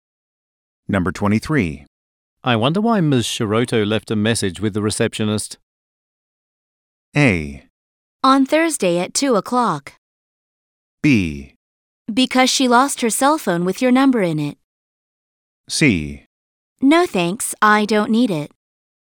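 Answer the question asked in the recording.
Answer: B: Because she lost her cell phone with your number in it.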